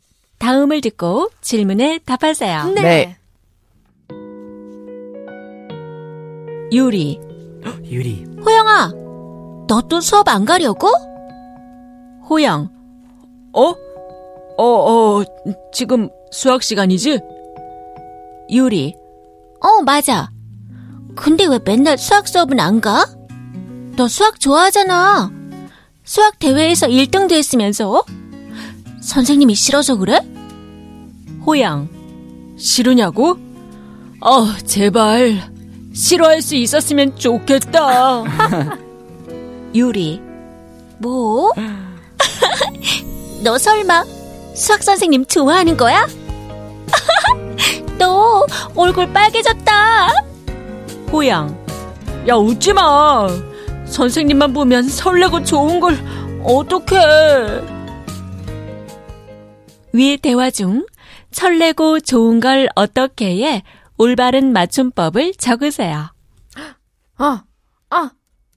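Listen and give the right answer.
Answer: 설레고 좋은 걸 어떡해 (뜻: 설레고 좋은데 어떻게 해야 하나)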